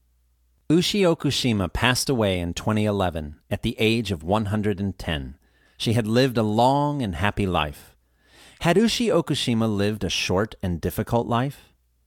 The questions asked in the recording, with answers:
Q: Had Ushi Okushima lived a short and difficult life?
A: No, she hadn't. She had lived a long and happy life.